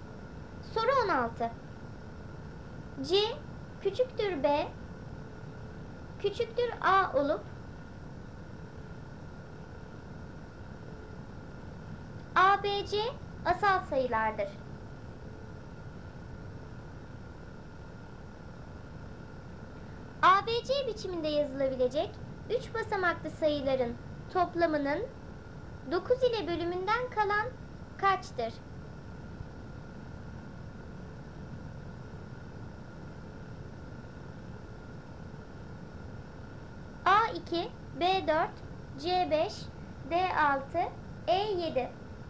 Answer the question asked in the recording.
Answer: Doğru cevap D6.